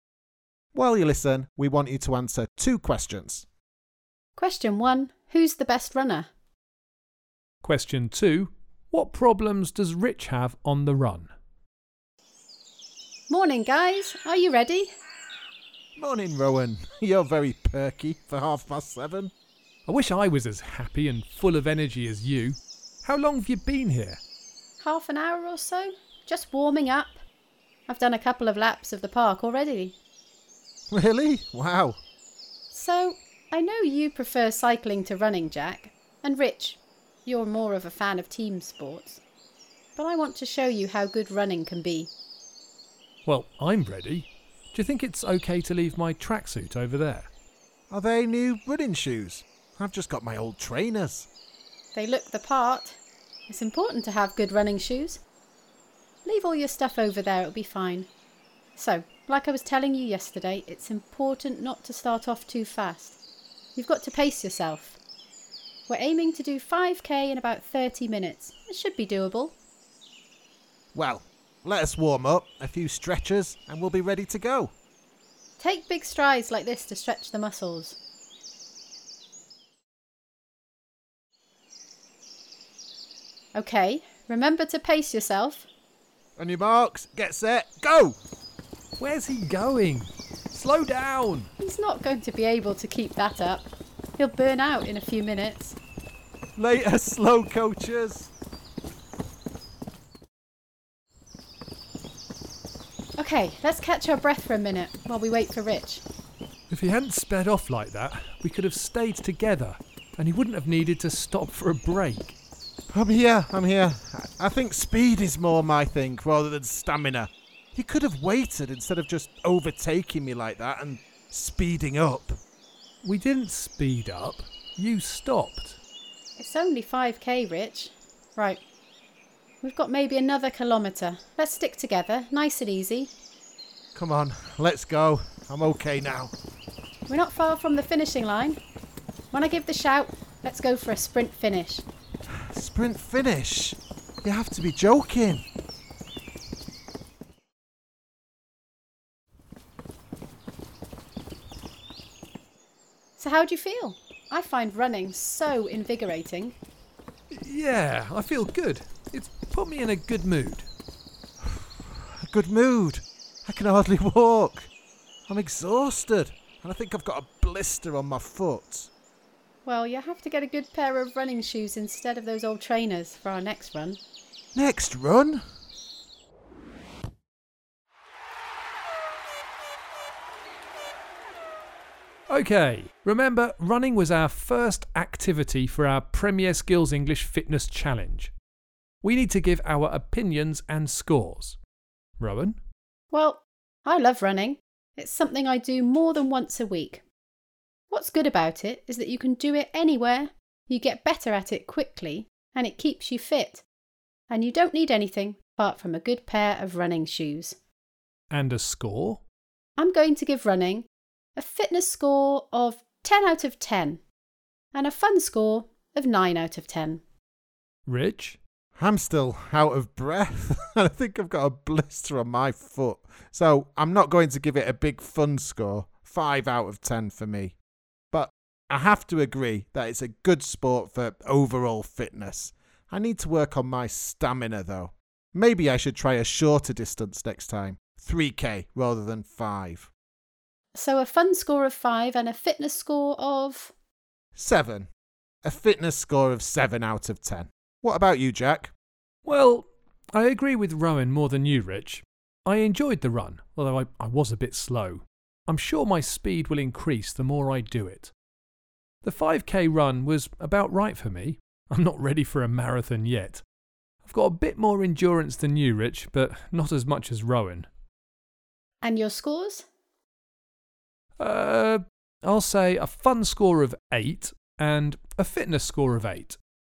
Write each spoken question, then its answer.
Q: who's the best runner?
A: Well, the answer to that, without a shadow of a doubt, is Rowan.

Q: what problems does Rich have on the run?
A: Well, he didn't have good footwear.